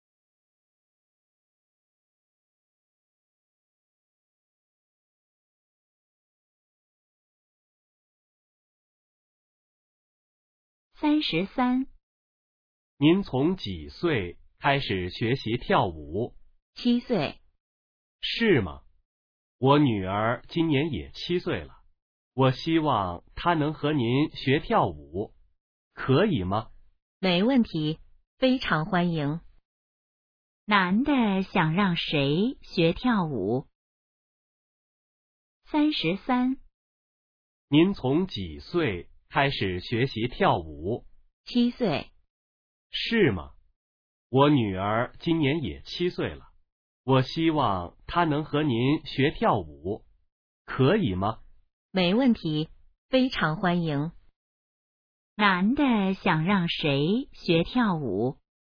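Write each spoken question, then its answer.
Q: 男的想让谁学跳舞?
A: 他的女儿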